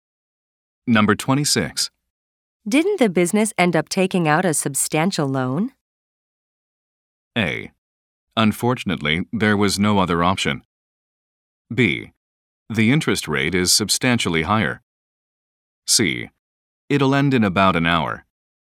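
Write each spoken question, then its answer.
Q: Didn't the business end up taking out a substantial loan?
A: A: Unfortunately, there was no other option.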